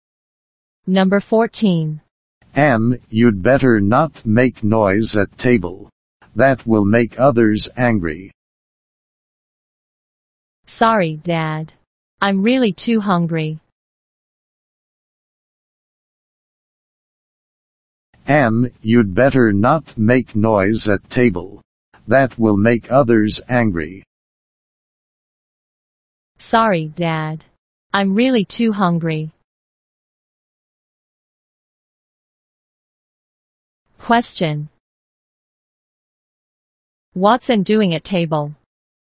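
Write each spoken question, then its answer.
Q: What's Anne doing at table?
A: Making noise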